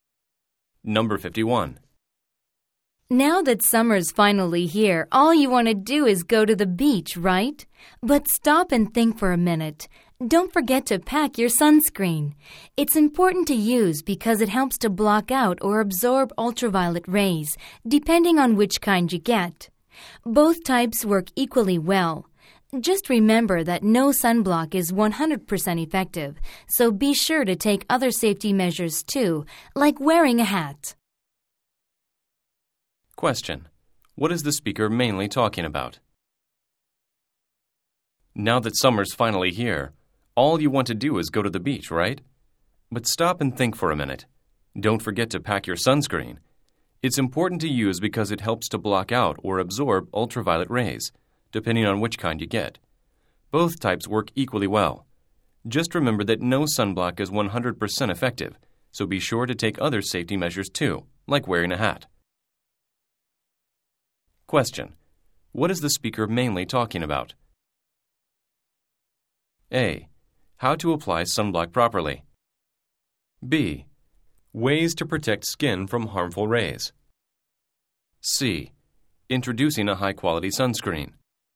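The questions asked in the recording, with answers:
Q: What is the speaker mainly talking about?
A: B: Ways to protect skin from harmful rays.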